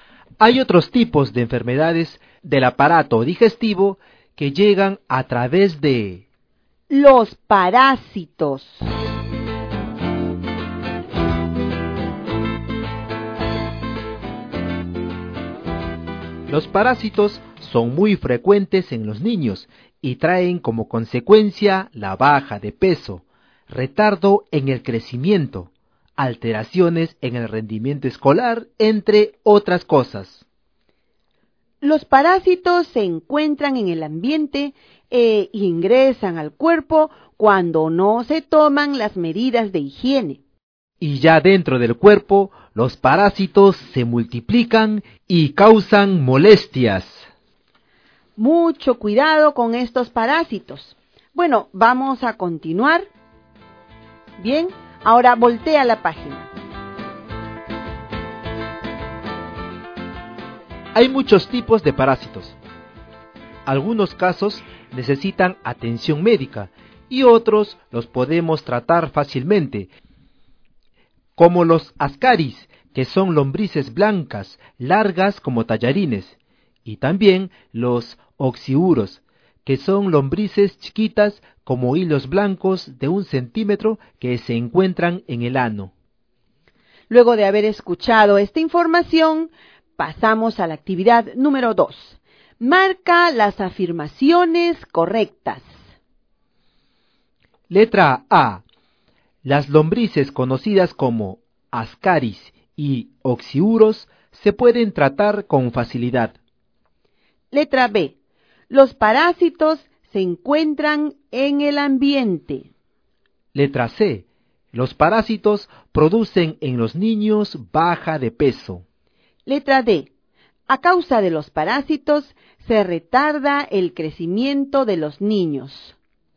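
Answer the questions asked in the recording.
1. Correcta
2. Correcta
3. Correcta
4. Correcta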